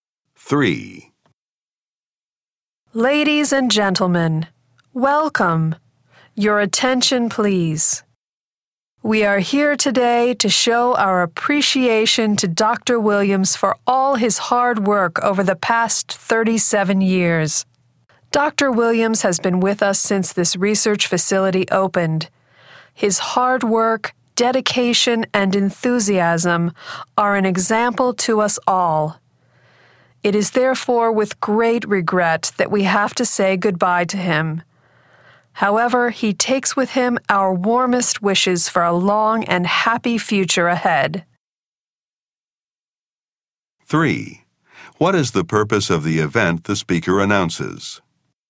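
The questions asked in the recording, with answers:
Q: What is the purpose of the event the speaker announces?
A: To say goodbye to Dr. Williams, who is retiring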